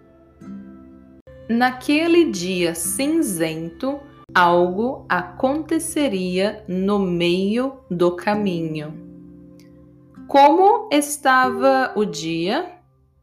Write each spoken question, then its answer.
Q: Como estava o dia?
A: Cinzento. O dia estava cinzento.